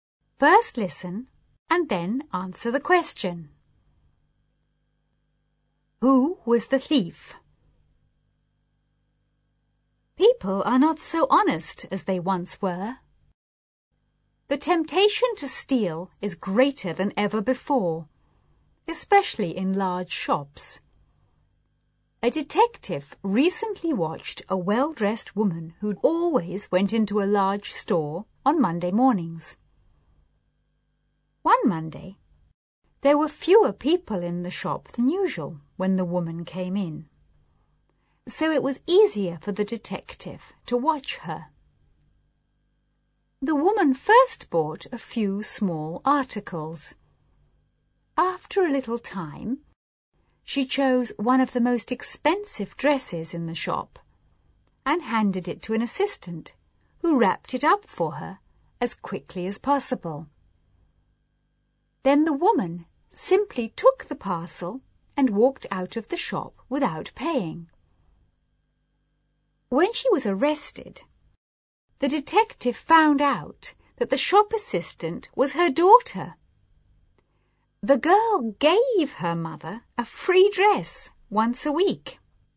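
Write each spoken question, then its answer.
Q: Who was the thief?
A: The shop assistant (the woman's daughter), along with her mother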